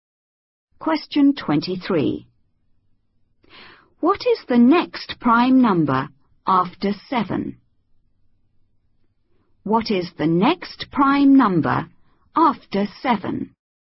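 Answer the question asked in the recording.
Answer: 11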